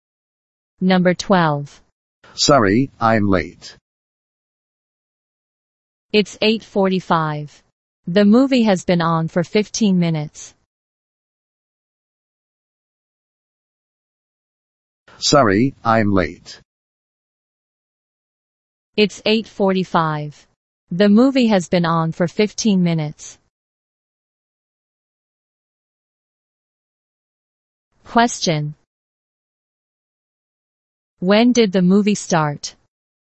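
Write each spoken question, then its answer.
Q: When did the movie start?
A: At 8:30.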